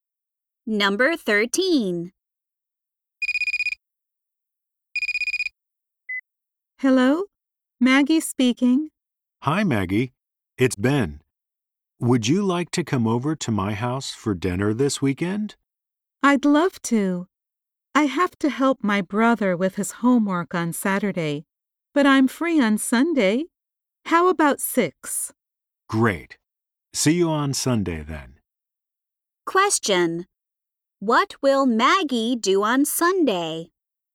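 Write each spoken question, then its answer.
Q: What will Maggie do on Sunday?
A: Have dinner at Ben's house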